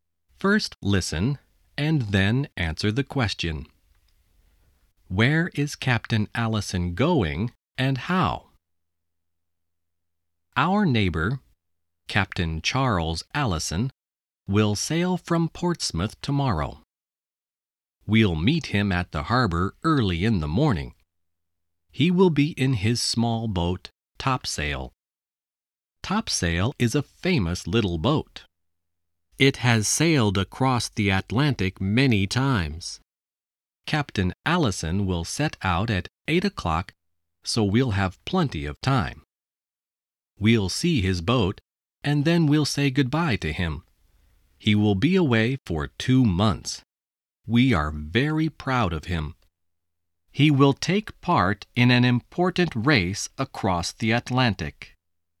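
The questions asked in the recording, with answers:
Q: Where is Captain Allison going and how?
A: He is sailing across the Atlantic, in a race, in his small boat Topsail.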